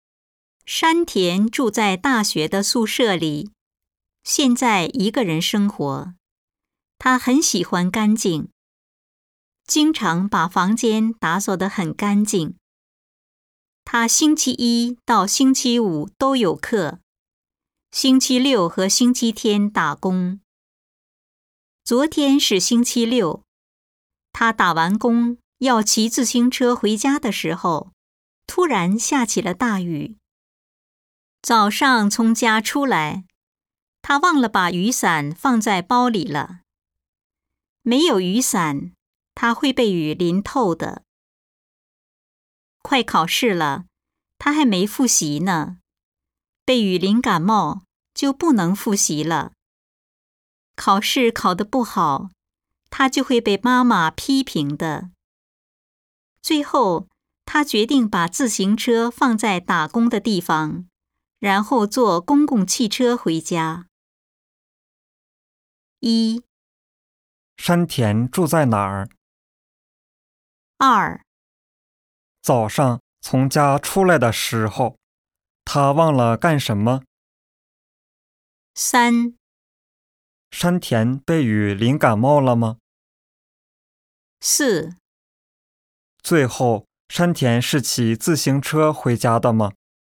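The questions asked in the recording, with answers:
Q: 山田住在哪儿?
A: 大学的宿舍里

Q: 早上从家出来的时候,他忘了干什么?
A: 把雨伞放在包里

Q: 山田被雨淋感冒了吗?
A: 没有,他坐公共汽车回家了

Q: 最后山田是骑自行车回家的吗?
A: 不是,他坐公共汽车回家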